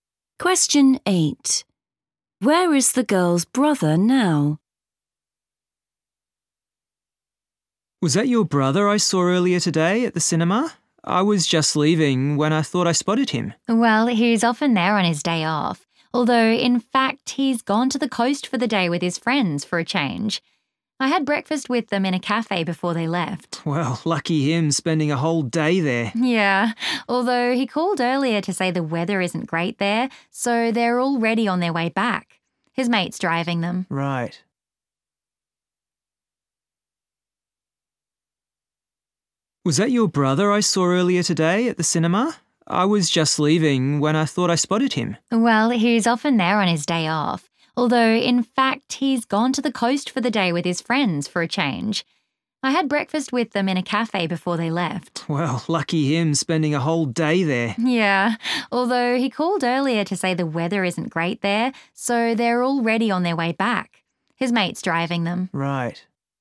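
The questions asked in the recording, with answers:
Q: Where is the girl's brother now?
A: in his friend's car, on the way back from the coast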